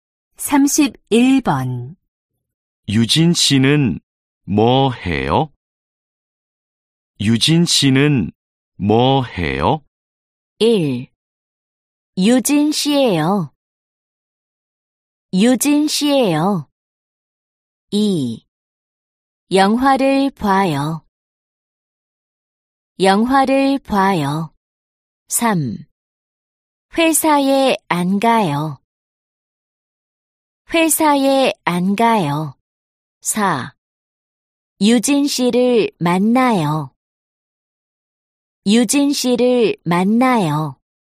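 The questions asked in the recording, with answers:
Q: 유진 씨는 뭐 해요?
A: 2: 영화를 봐요.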